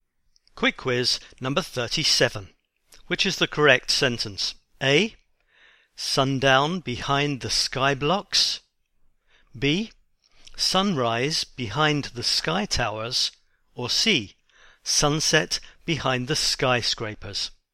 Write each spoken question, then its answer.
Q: Which is the correct sentence?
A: And the answer is C. It's sunset behind the skyscrapers.